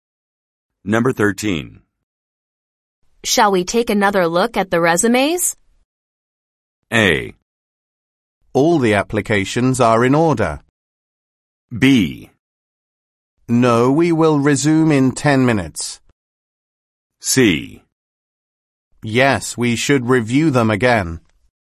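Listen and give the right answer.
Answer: C: Yes, we should review them again.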